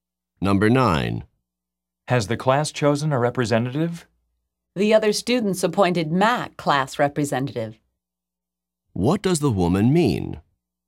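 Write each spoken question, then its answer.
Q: What does the woman mean?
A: Matt was chosen as class representative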